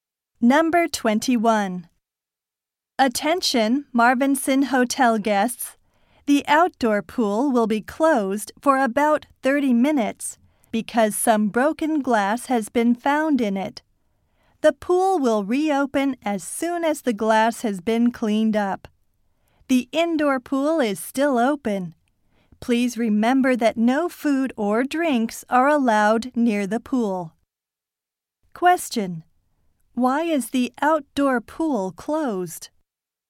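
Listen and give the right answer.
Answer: Some broken glass was found in it.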